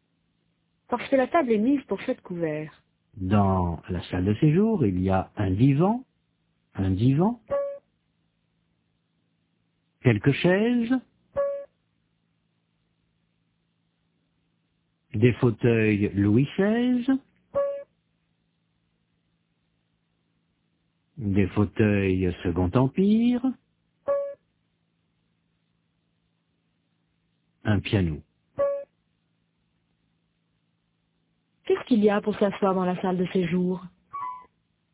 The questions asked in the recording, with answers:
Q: Qu'est-ce qu'il y a pour s'asseoir dans la salle de séjour?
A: Un divan, quelques chaises, des fauteuils.